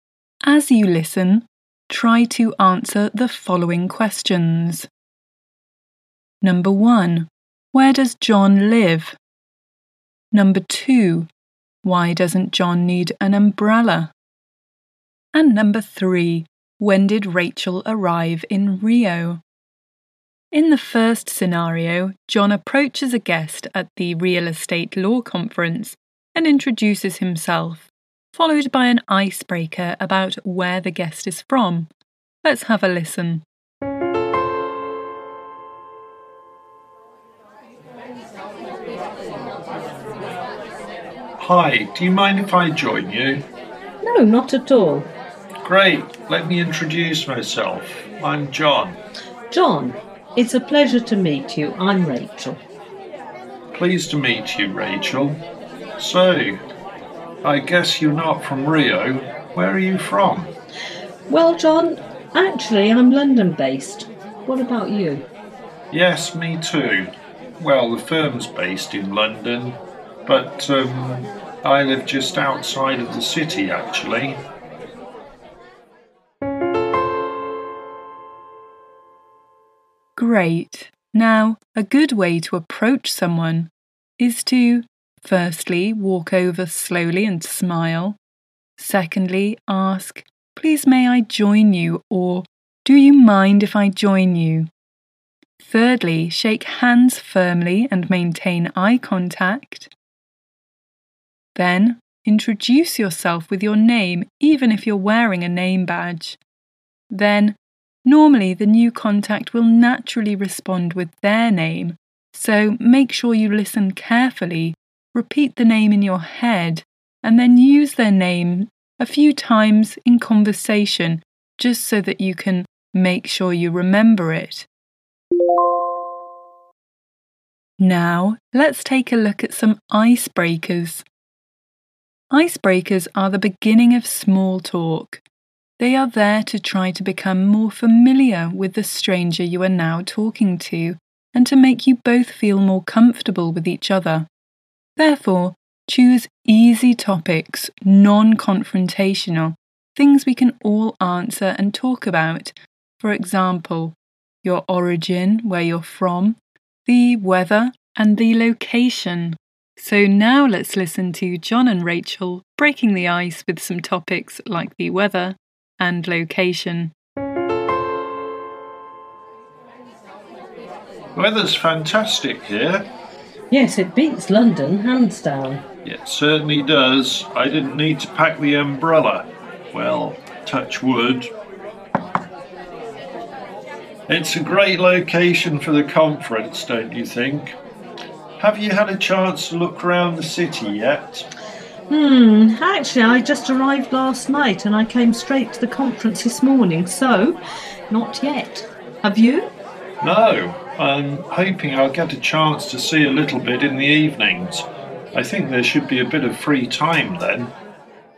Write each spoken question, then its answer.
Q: Where does John live?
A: John lives just outside of London.

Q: Why doesn't John need an umbrella?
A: John doesn't need the umbrella because the weather is fantastic, meaning it's not raining but it's sunny.

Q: When did Rachel arrive in Rio?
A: So, Rachel arrived last night in Rio.